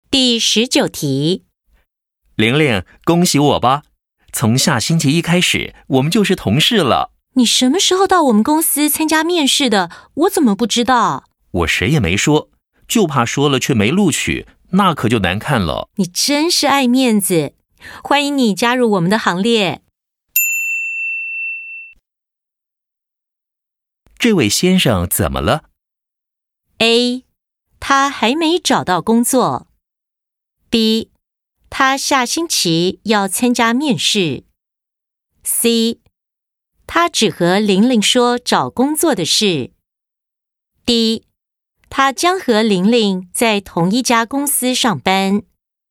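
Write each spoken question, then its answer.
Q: 这位先生怎么了?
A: D: 他将和玲玲在同一家公司上班。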